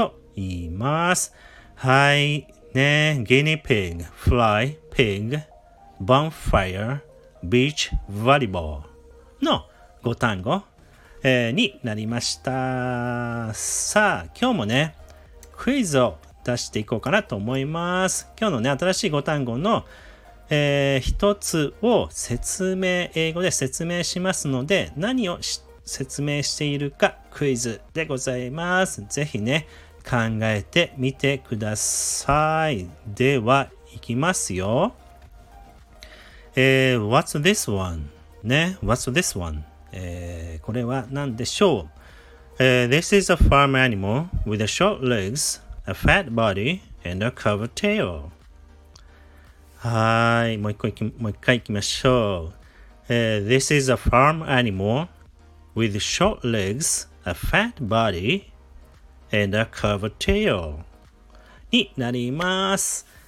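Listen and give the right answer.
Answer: pig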